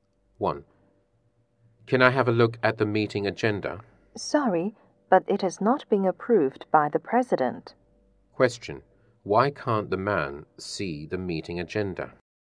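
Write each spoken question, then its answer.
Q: Why can't the man see the meeting agenda?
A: It has not been approved by the President yet.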